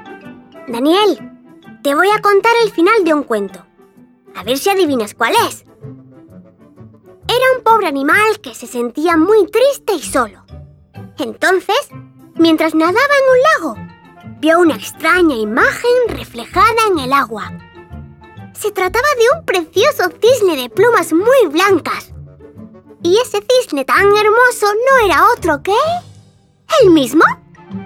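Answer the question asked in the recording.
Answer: El patito feo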